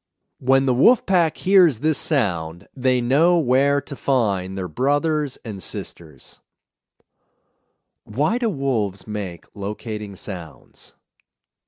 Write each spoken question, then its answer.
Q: Why do wolves make locating sounds?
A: They make locating sounds to find their brothers and sisters.